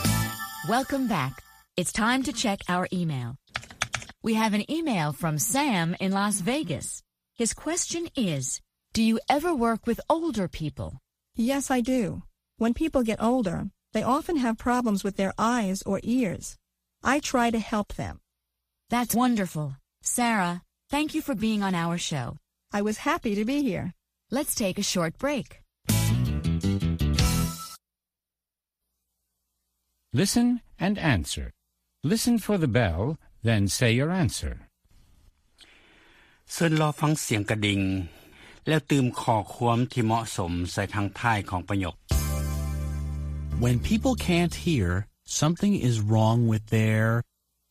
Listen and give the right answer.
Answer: ears. Something is wrong with their ears.